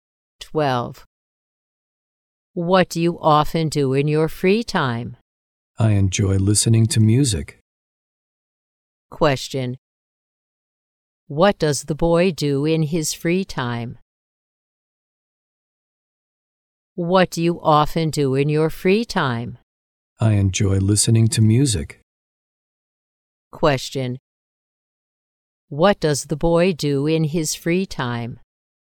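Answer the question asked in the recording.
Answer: Listening to music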